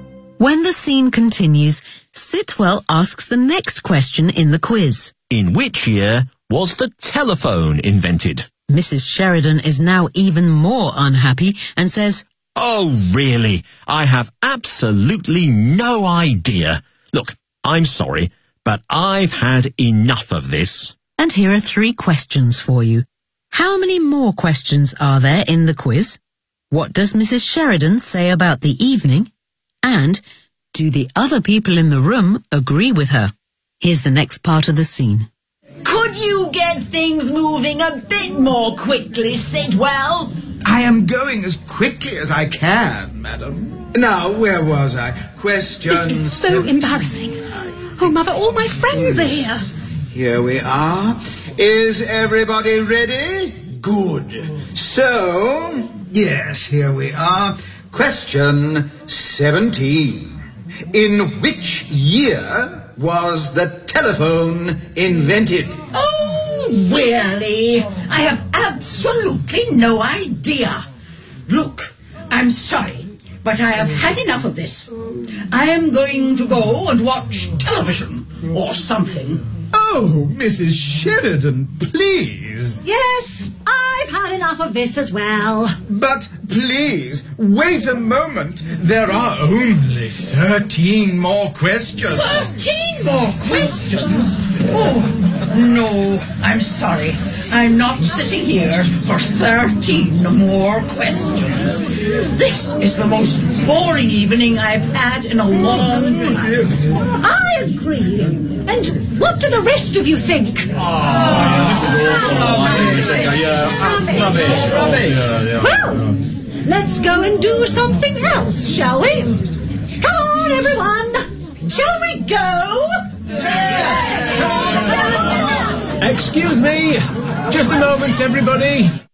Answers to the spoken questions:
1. there are only 13 more questions.
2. this is the most boring evening I've had in a long time.
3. Yes, they do. In fact, they all decide to leave.